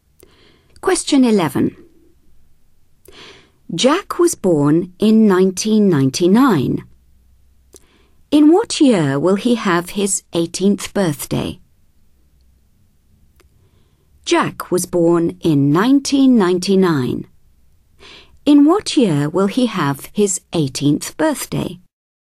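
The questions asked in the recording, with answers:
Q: In what year will he have his 18th birthday?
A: 2017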